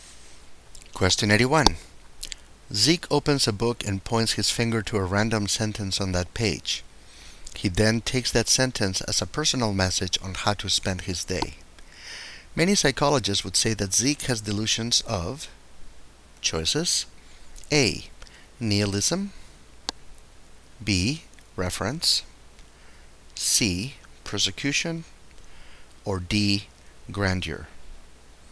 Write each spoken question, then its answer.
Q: Many psychologists would say that Zeke has delusions of,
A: The correct choice is B. Reference.